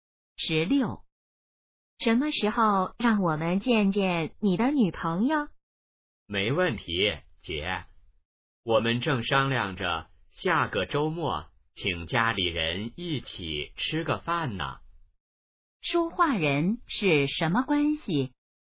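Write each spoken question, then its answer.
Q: 说话人是什么关系?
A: 姐弟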